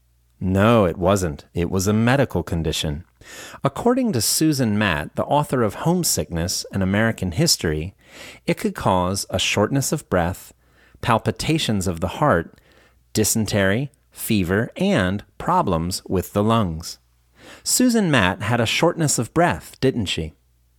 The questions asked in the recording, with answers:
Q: Susan Matt had a shortness of breath, didn't she?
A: No, she didn't. She was the author of Homesickness, An American History.